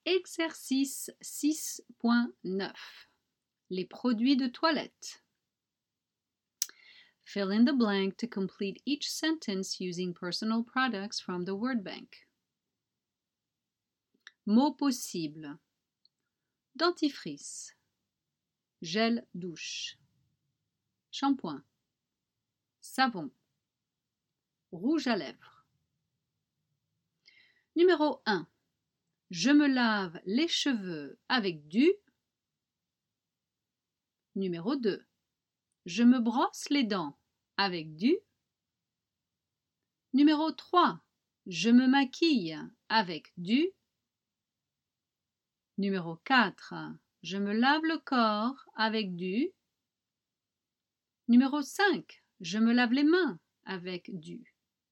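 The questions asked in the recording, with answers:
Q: Je me lave les cheveux avec du.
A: shampoing

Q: Je me brosse les dents avec du.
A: dentifrice

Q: Je me maquille avec du.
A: rouge à lèvres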